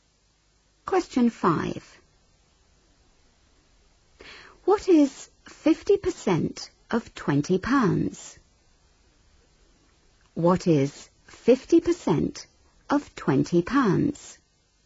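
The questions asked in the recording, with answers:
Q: What is 50% of £20?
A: £10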